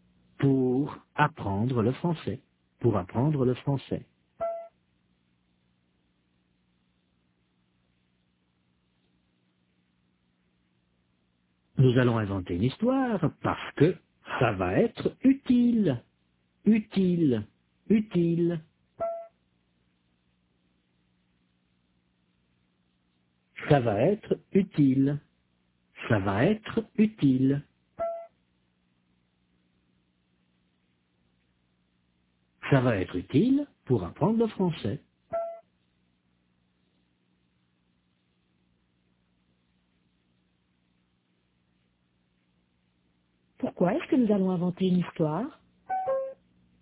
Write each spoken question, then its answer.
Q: Pourquoi est-ce que nous allons inventer une histoire?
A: Parce que ça va être utile pour apprendre le français.